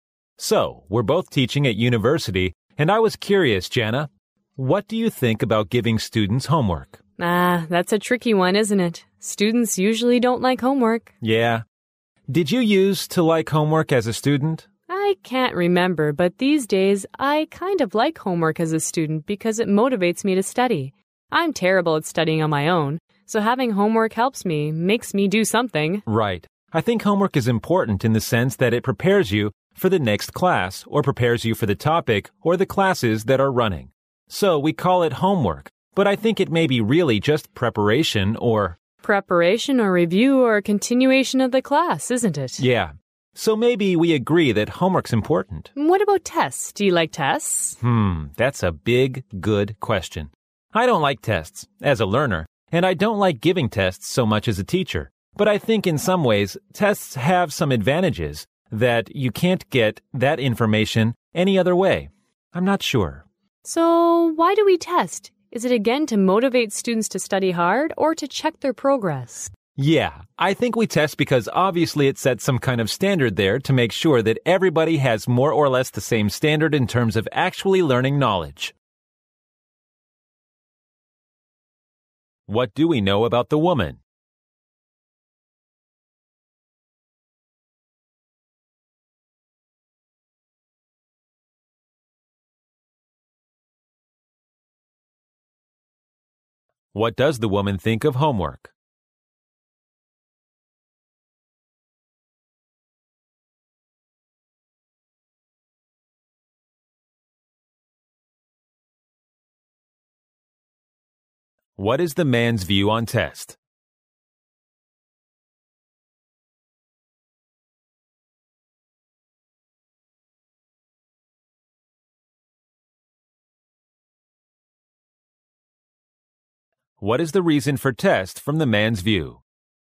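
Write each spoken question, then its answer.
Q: What does the woman think of homework?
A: It motivates students to study.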